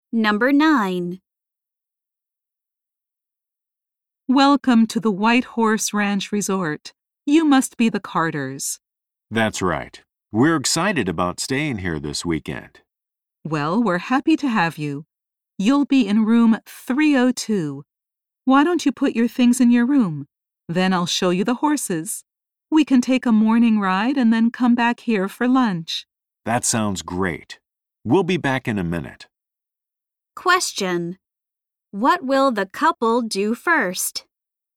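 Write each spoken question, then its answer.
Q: What will the couple do first?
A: Put their things in their room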